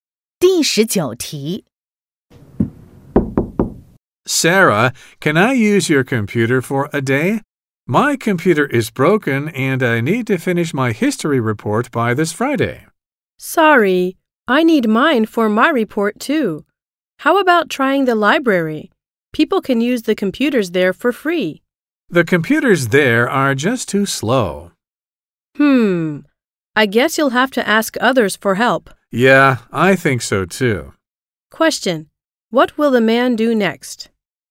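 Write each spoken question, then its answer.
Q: What will the man do next?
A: Ask others for help with a computer.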